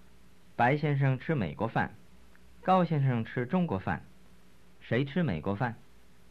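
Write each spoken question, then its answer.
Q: 谁吃美国饭?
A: 白先生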